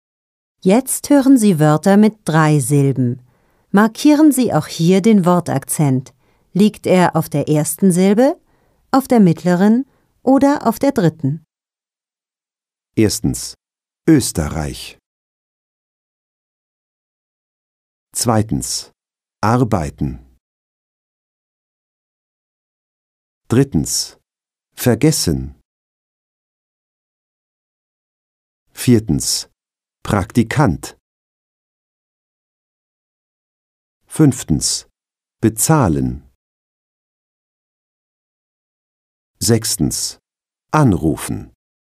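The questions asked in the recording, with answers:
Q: Erstens, Österreich.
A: Auf der ersten Silbe

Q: Zweitens, arbeiten.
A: Auf der ersten Silbe

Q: Drittens, vergessen.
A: Auf der mittleren Silbe

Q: Viertens, Praktikant.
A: Auf der dritten Silbe

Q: Fünftens, bezahlen.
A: Auf der mittleren Silbe

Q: Sechstens, anrufen.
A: Auf der ersten Silbe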